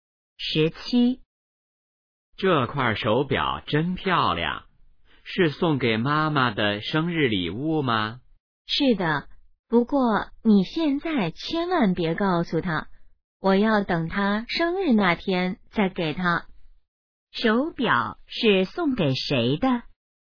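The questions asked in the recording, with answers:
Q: 手表是送给谁的?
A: 妈妈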